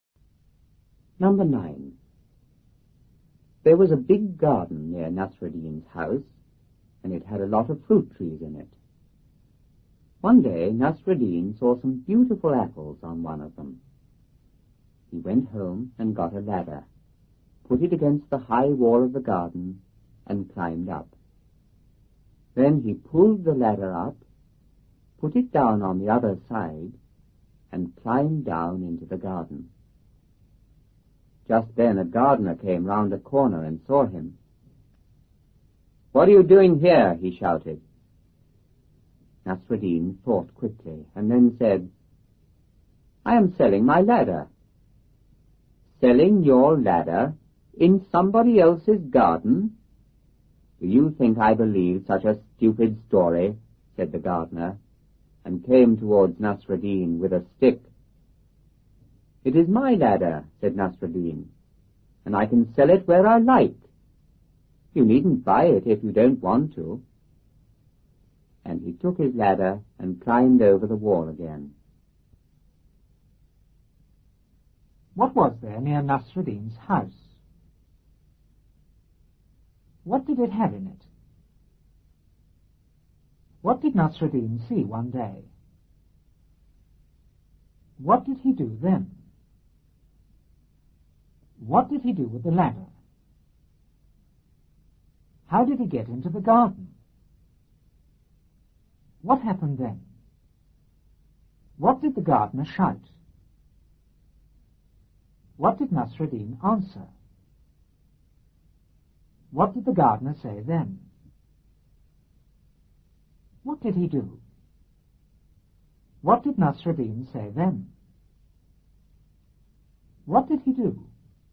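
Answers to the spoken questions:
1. A big garden
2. A lot of fruit trees
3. Some beautiful apples on one of the trees
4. He went home and got a ladder
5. He put it against the high wall of the garden and climbed up
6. He pulled the ladder up, put it down on the other side and climbed down
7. A gardener came round a corner and saw him
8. "What are you doing here?"
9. "I am selling my ladder."
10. "Selling your ladder in somebody else's garden? Do you think I believe such a stupid story?"
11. He came towards Nasruddin with a stick
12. "It is my ladder, and I can sell it where I like. You needn't buy it if you don't want to."
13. He took his ladder and climbed over the wall again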